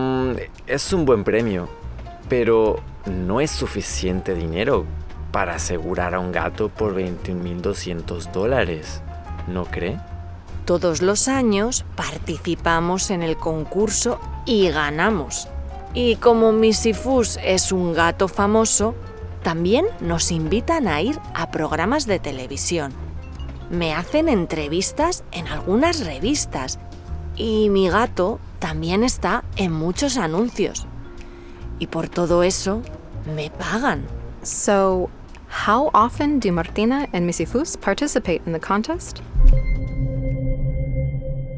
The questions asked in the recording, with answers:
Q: So, how often do Martina and Missy Foos participate in the contest?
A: Sí, they participate todos los años, every year.